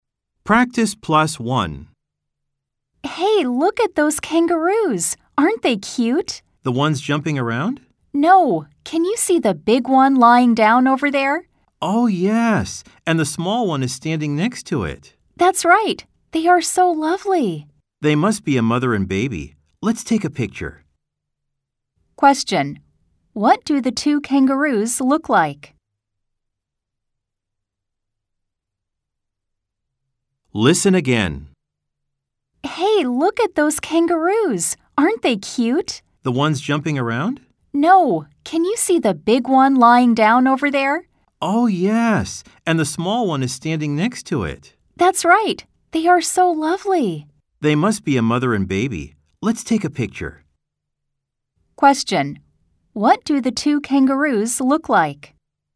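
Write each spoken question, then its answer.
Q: What do the two kangaroos look like?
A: The big one is lying down and the small one is standing next to it.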